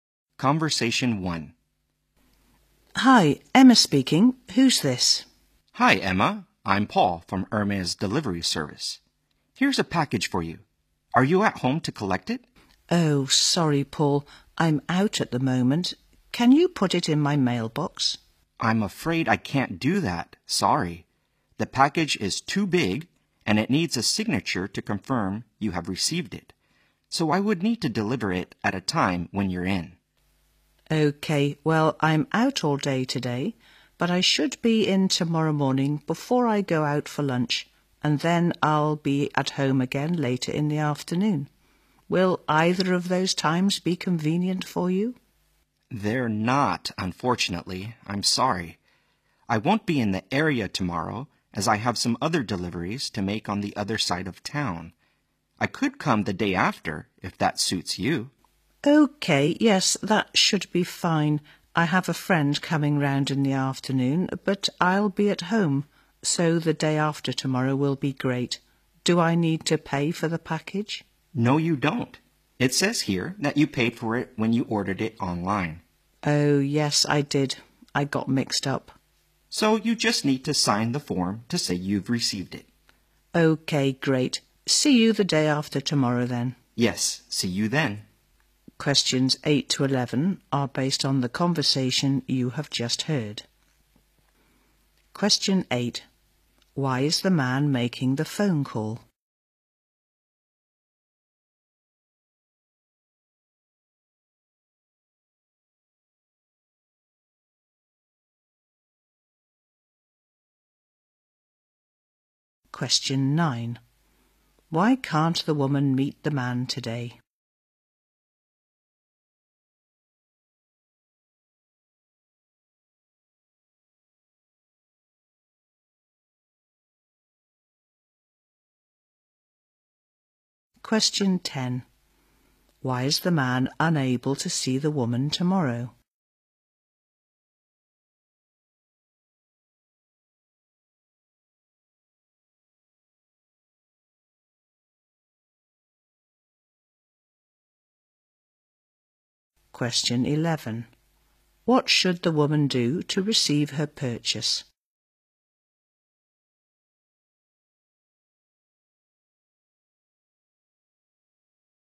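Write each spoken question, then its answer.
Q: Why is the man making the phone call?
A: To deliver a package to her

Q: Why can't the woman meet the man today?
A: She is out all day

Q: Why is the man unable to see the woman tomorrow?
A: He has other deliveries on the other side of town

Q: What should the woman do to receive her purchase?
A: Sign the form to confirm receipt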